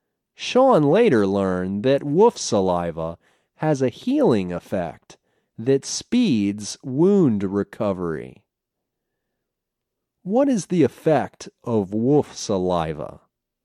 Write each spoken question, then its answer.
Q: What is the effect of wolf saliva?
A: Wolf saliva has a healing effect that speeds wound recovery.